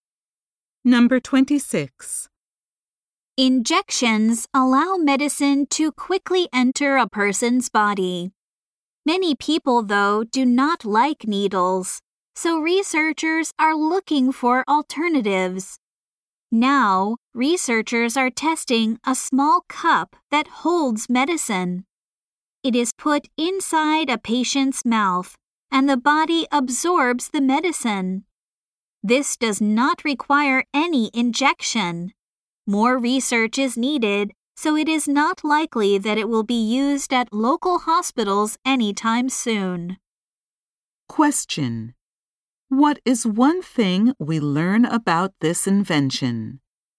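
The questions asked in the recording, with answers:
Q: What is one thing we learn about this invention?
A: It delivers medicine through the mouth without an injection.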